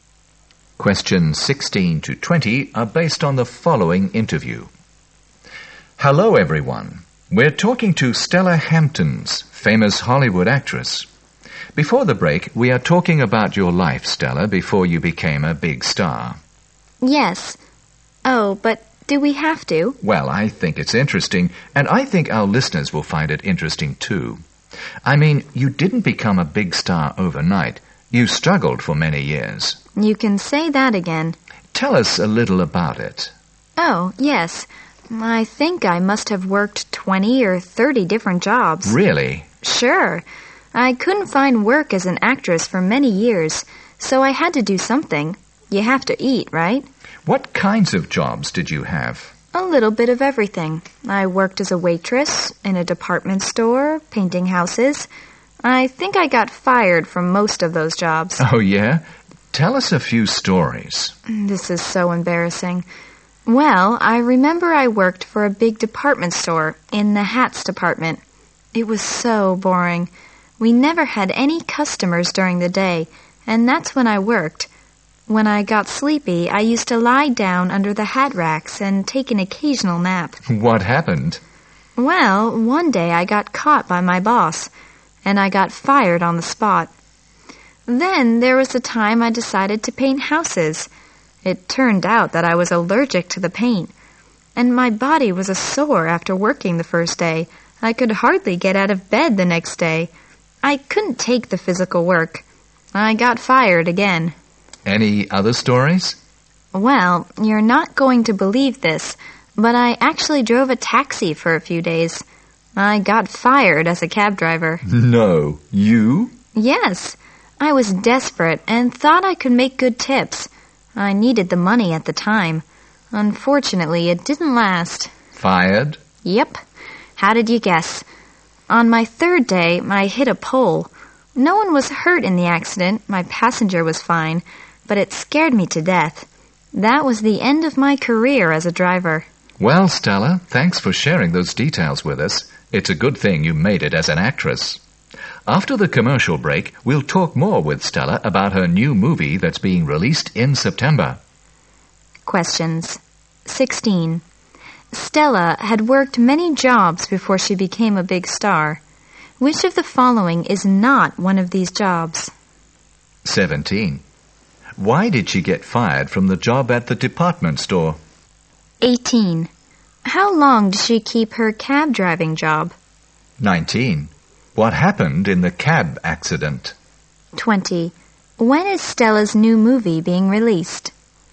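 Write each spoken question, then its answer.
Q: Why did she get fired from the job at the department store?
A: She was caught napping under the hat racks

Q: How long did she keep her cab driving job?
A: Three days

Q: What happened in the cab accident?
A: She hit a pole; no one was hurt

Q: When is Stella's new movie being released?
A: In September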